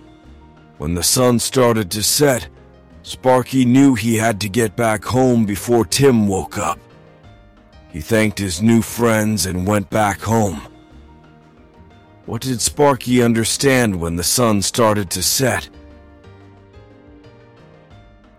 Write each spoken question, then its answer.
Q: What did Sparky understand when the sun started to set?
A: He knew he had to get back home before Tim woke up.